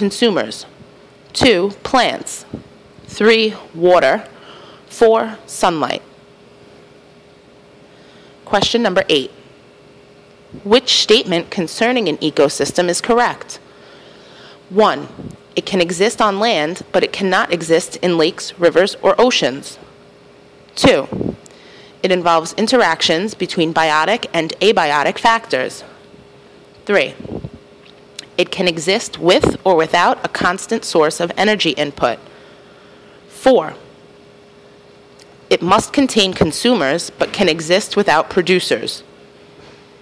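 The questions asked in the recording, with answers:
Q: Which statement concerning an ecosystem is correct?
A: 2: It involves interactions between biotic and abiotic factors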